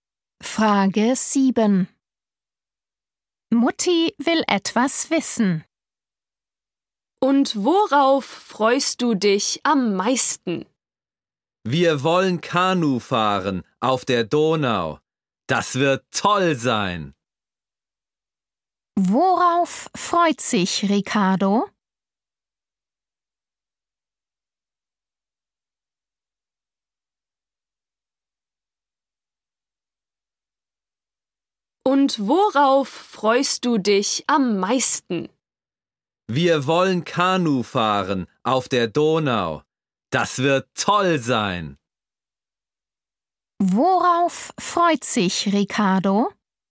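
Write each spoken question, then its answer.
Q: Worauf freut sich Ricardo?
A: auf Kanufahren auf der Donau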